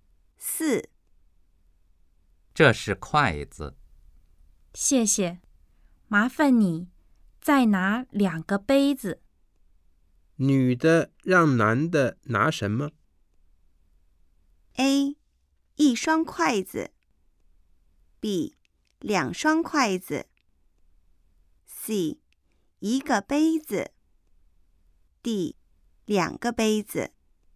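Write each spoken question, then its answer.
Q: 女的让男的拿什么?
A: D: 两个杯子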